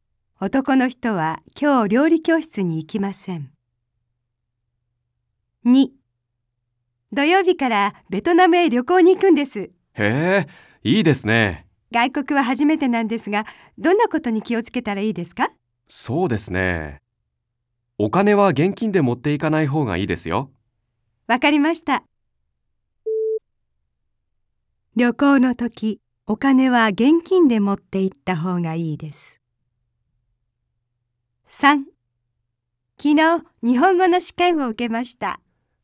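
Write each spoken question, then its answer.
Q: 旅行の時、お金は現金で持って行った方がいいです。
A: ×(正しくない)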